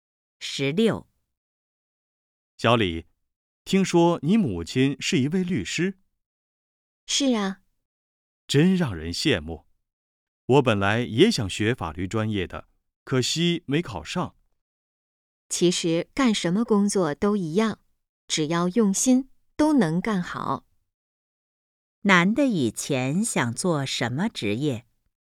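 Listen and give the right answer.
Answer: 律师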